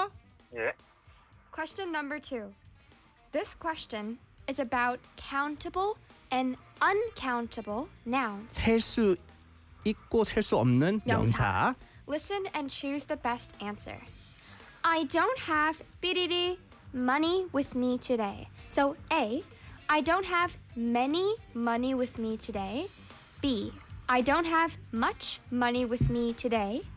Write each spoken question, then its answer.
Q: I don't have bidi money with me today.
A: Much money.